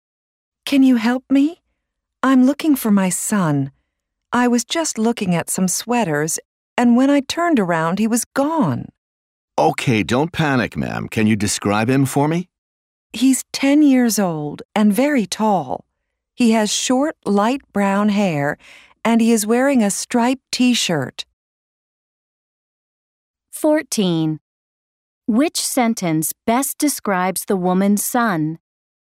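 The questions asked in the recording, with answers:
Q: Which sentence best describes the woman's son?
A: He is 10, very tall, with short light brown hair and a striped T-shirt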